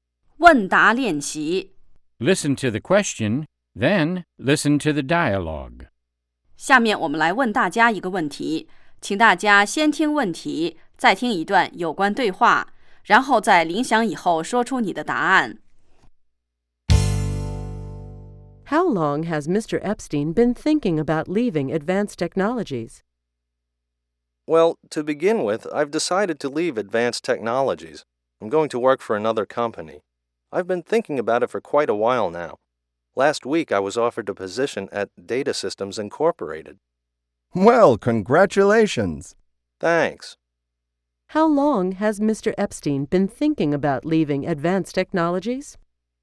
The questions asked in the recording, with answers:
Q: How long has Mr. Epstein been thinking about leaving Advanced Technologies?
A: He's been thinking about leaving for quite a while.